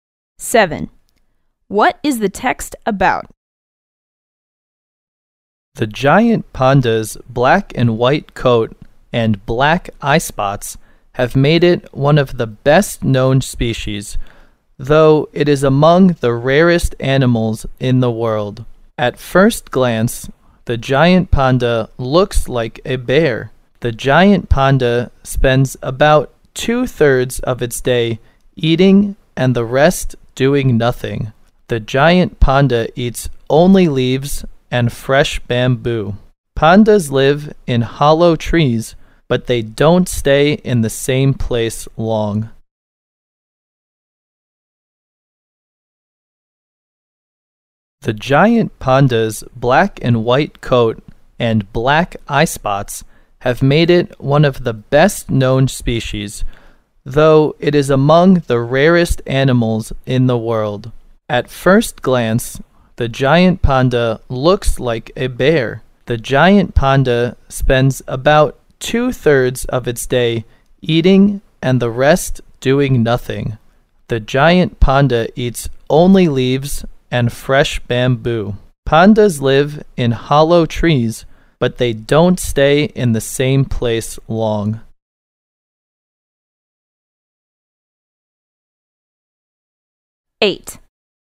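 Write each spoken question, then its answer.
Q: What is the text about?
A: The giant panda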